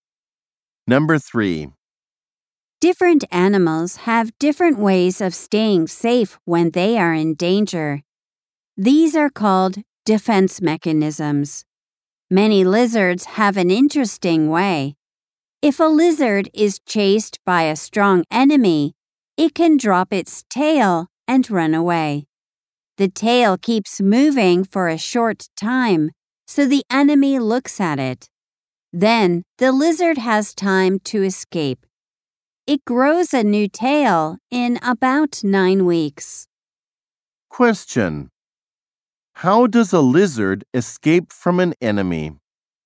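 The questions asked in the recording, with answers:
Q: How does a lizard escape from an enemy?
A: It drops its tail and runs away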